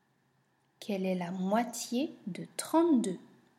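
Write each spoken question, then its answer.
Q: Quelle est la moitié de 32?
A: 16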